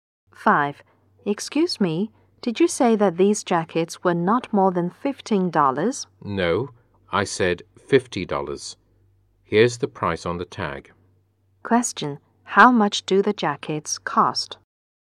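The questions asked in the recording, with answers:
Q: How much do the jackets cost?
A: $50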